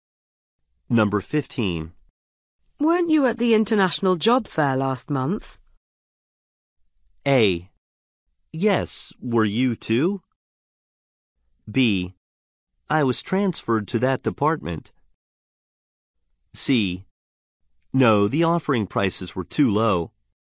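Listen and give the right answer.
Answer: A: Yes, were you too?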